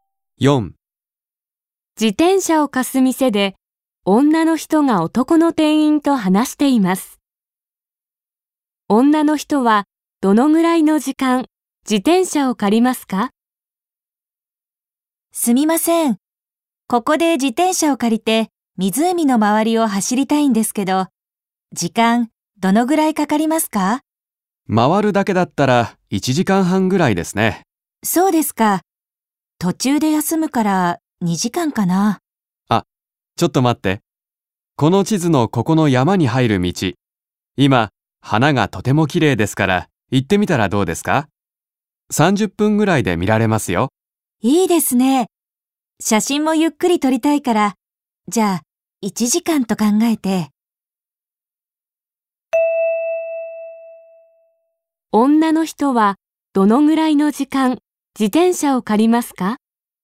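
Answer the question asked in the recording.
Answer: 3時間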